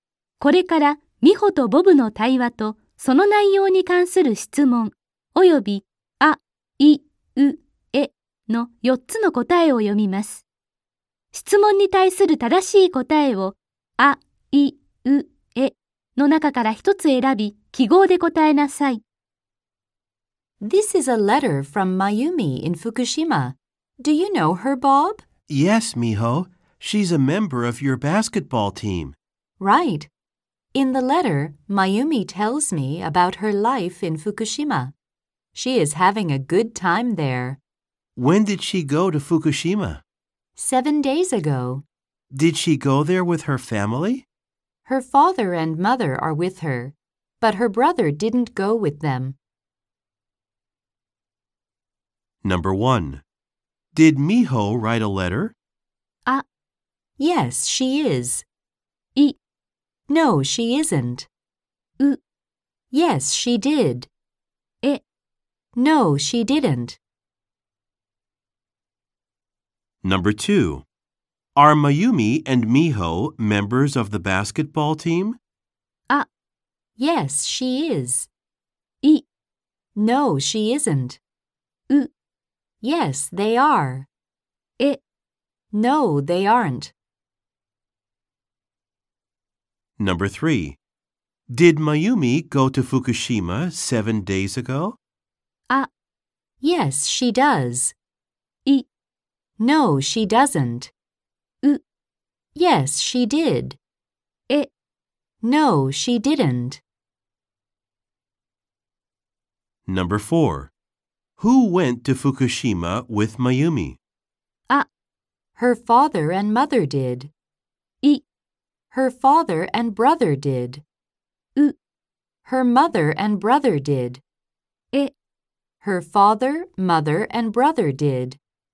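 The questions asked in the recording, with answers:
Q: Did Miho write a letter?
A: え: No, she didn't.

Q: Are Mayumi and Miho members of the basketball team?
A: う: Yes, they are.

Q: Did Mayumi go to Fukushima 7 days ago?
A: う: Yes, she did.

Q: Who went to Fukushima with Mayumi?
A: あ: Her father and mother did.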